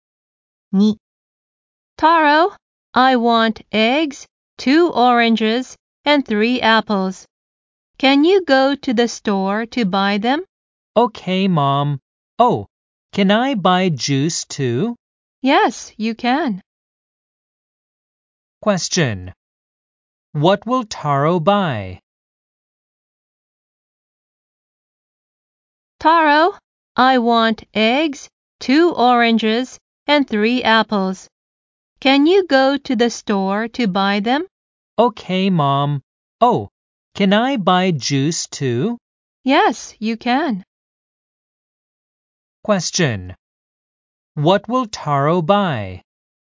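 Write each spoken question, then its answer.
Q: What will Taro buy?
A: Eggs, 2 oranges, 3 apples and juice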